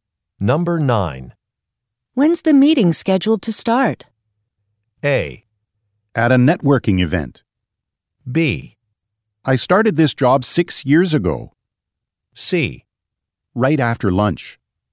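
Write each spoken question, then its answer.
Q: When's the meeting scheduled to start?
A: C: Right after lunch.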